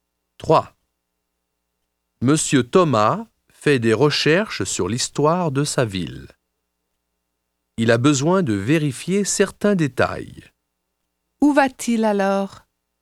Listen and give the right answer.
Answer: Il va à la bibliothèque.